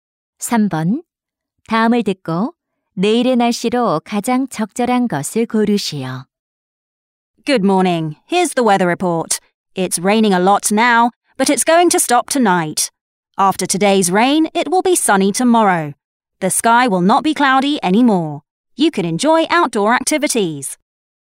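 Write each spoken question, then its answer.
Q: 다음을 듣고 내일의 날씨로 가장 적절한 것을 고르시오.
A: 맑음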